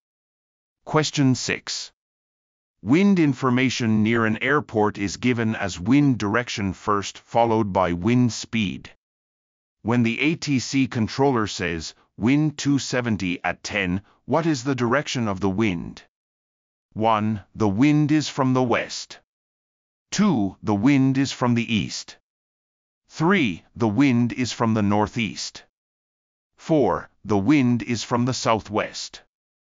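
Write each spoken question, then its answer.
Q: When the ATC controller says wind 270 at 10, what is the direction of the wind?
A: 1: The wind is from the west.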